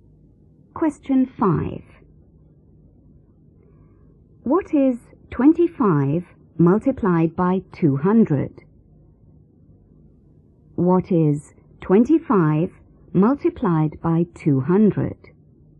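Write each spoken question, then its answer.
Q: What is 25 multiplied by 200?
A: 5000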